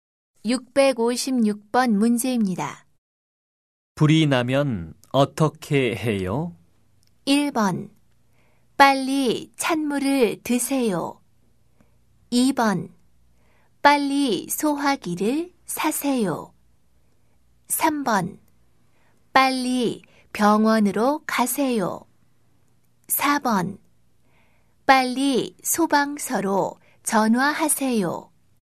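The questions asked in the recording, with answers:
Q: 불이 나면 어떻게 해요?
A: 4: 빨리 소방서로 전화하세요.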